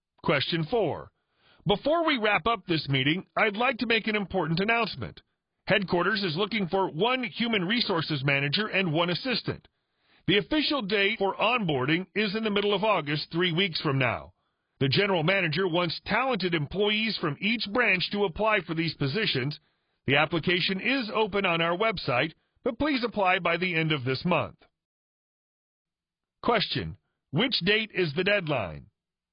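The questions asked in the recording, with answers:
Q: Which date is the deadline?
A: The end of this month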